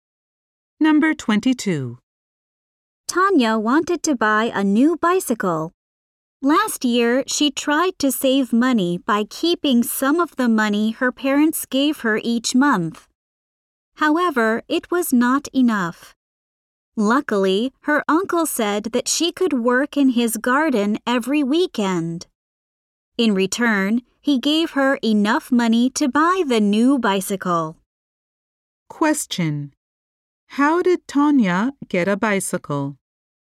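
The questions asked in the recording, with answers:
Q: How did Tanya get a bicycle?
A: She worked in her uncle's garden to earn the money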